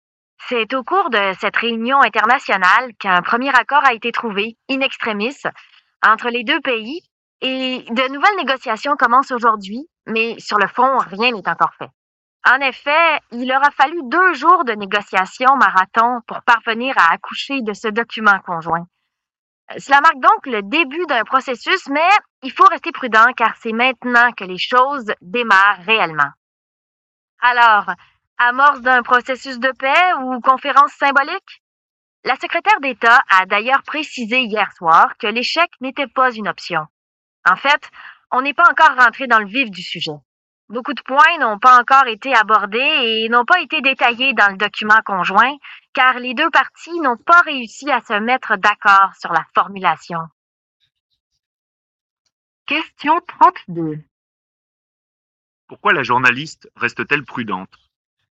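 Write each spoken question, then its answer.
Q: Pourquoi la journaliste reste-t-elle prudente?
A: Parce que rien n'est encore fait : les négociations ne font que commencer et beaucoup de points restent sans accord.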